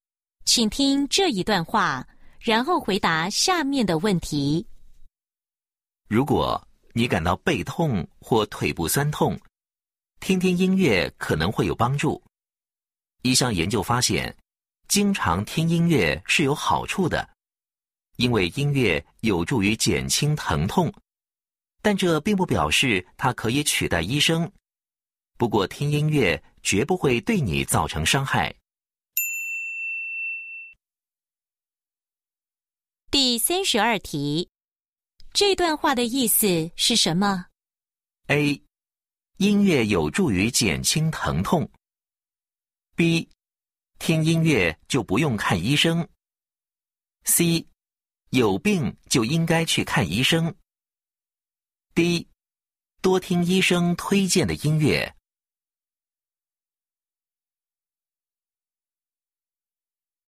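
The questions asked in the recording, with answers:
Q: 这段话的意思是什么?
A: A: 音乐有助于减轻疼痛。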